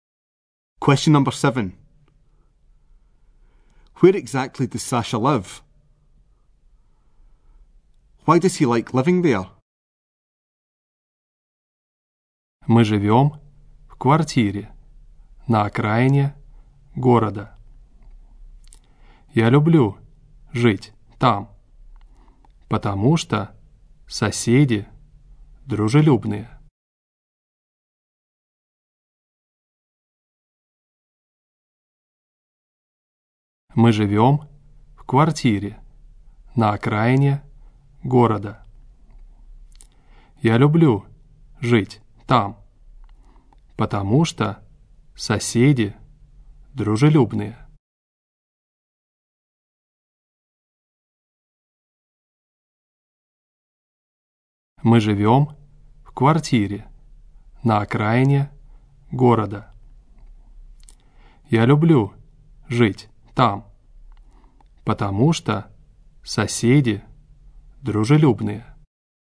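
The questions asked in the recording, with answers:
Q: Where exactly does Sasha live?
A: In a flat on the outskirts of town

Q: Why does he like living there?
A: The neighbours are friendly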